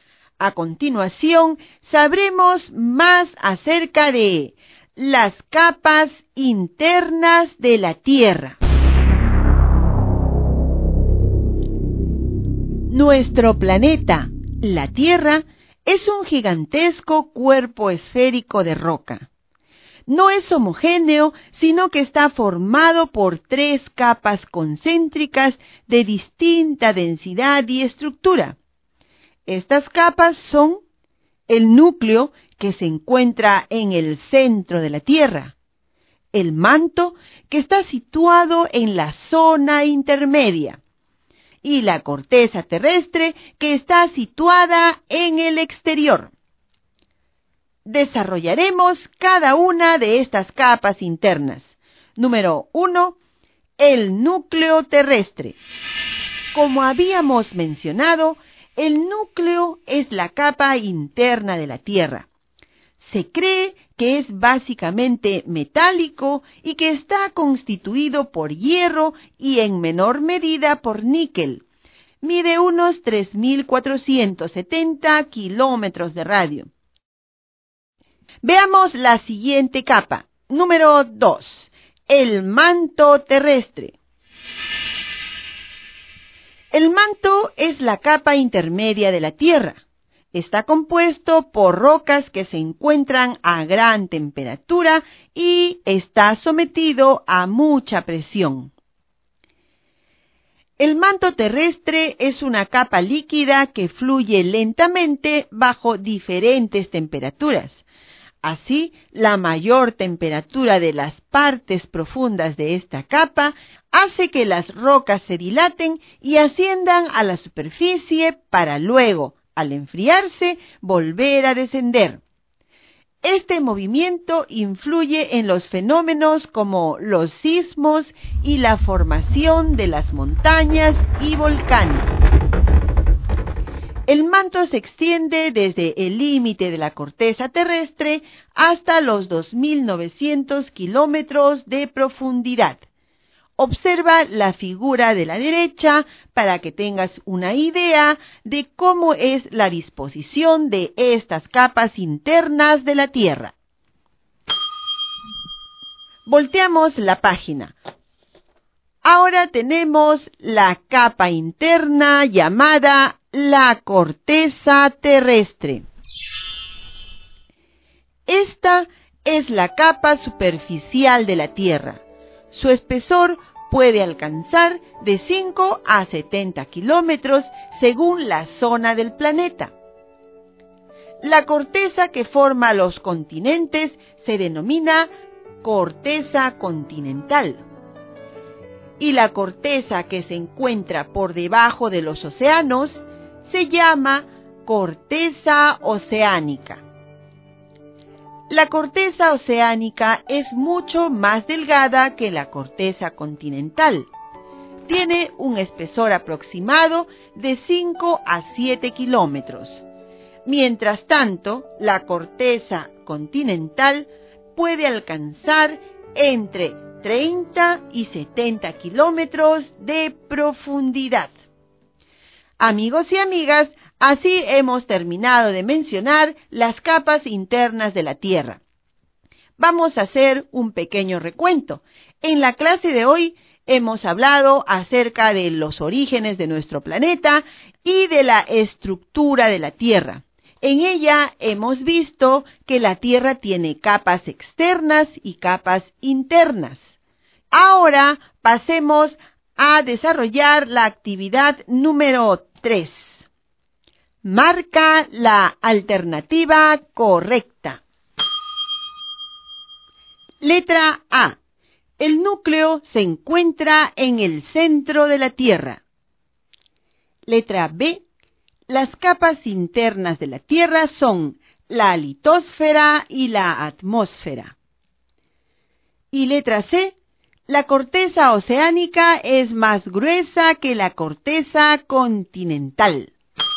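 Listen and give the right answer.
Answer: A: El núcleo se encuentra en el centro de la Tierra.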